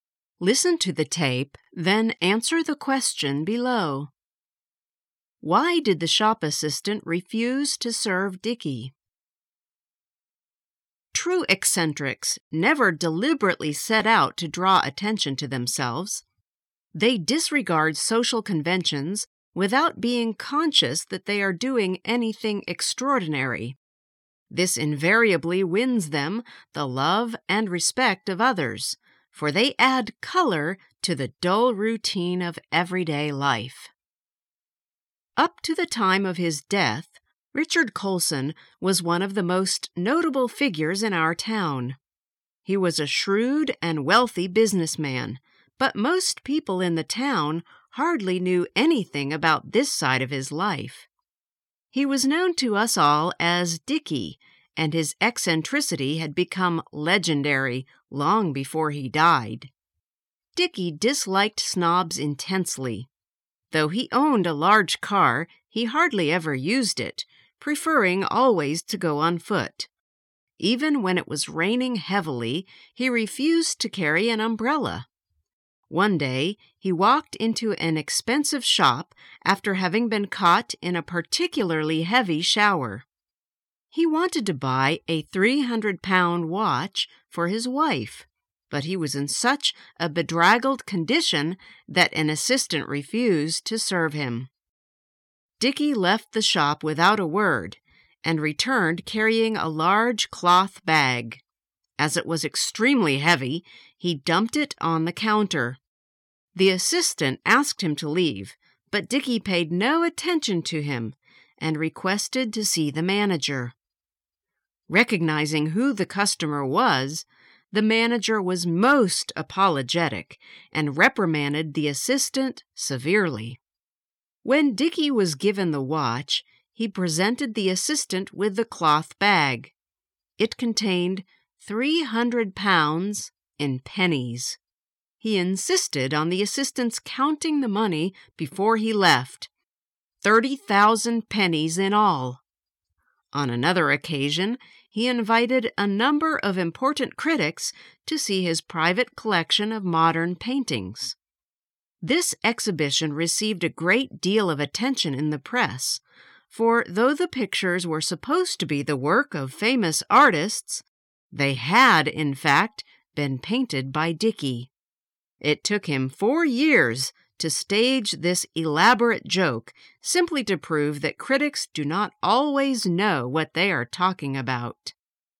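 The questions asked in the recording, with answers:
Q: Why did the shop assistant refuse to serve Dickie?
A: Because he was in a bedraggled condition after being caught in a heavy shower.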